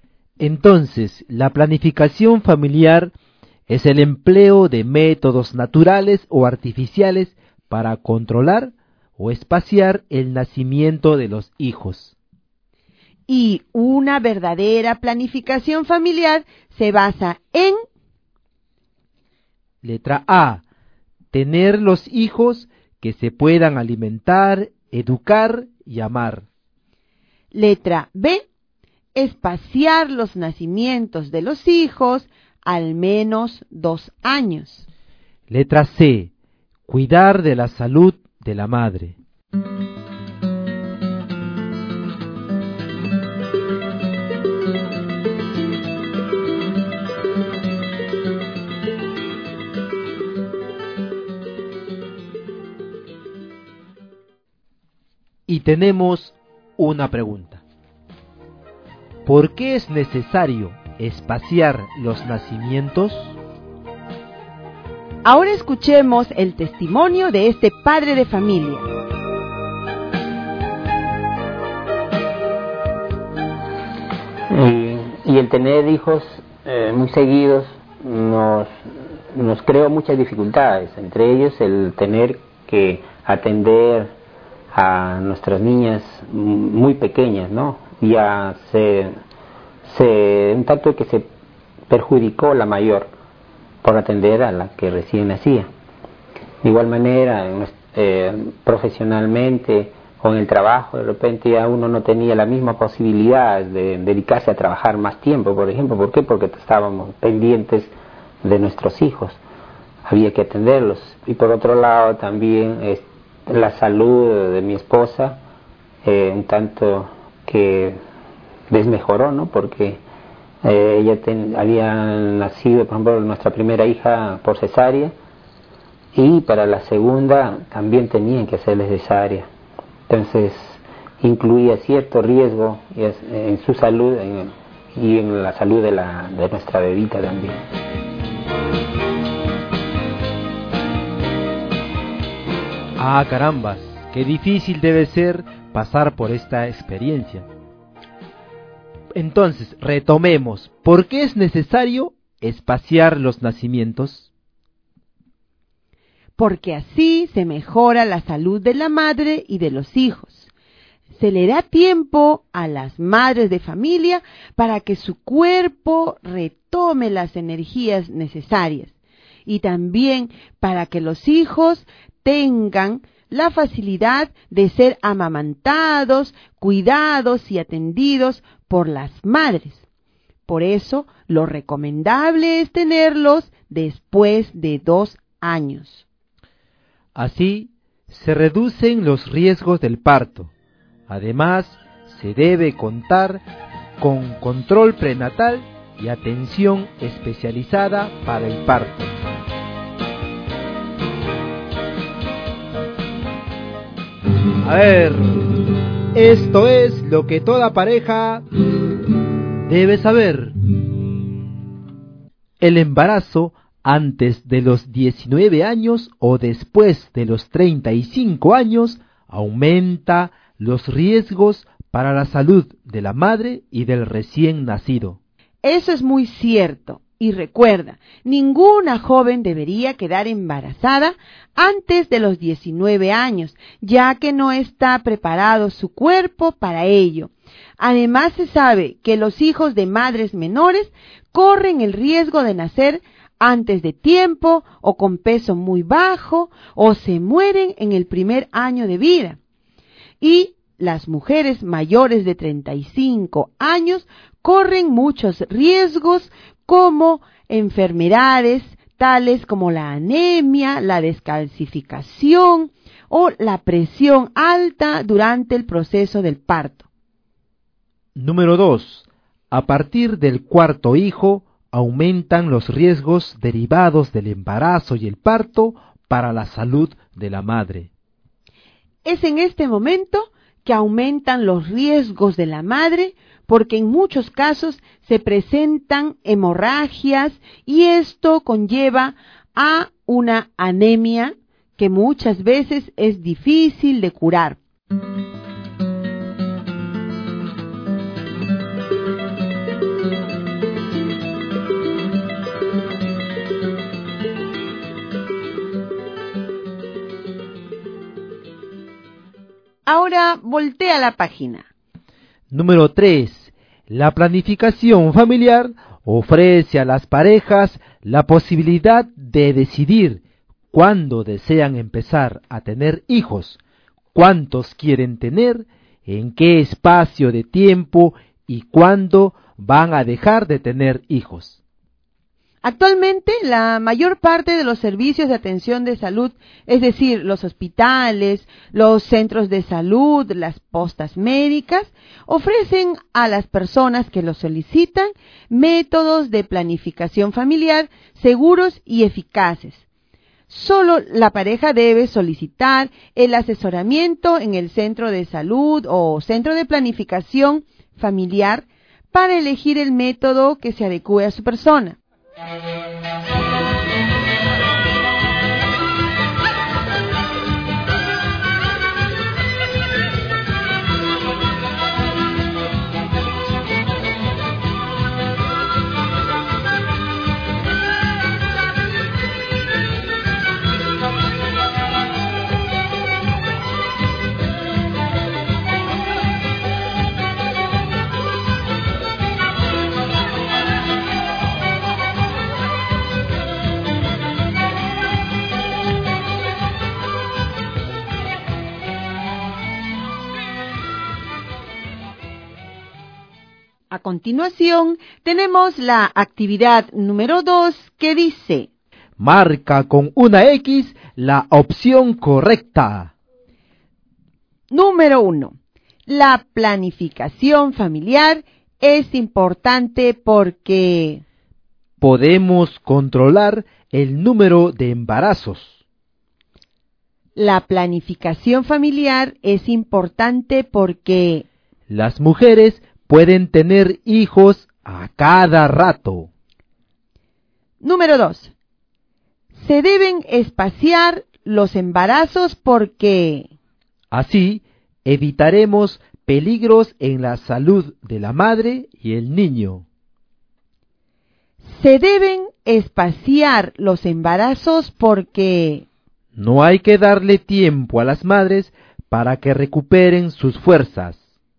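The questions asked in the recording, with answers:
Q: Número 1. La planificación familiar es importante porque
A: podemos controlar el número de embarazos

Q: Número 2. Se deben espaciar los embarazos porque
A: así evitaremos peligros en la salud de la madre y el niño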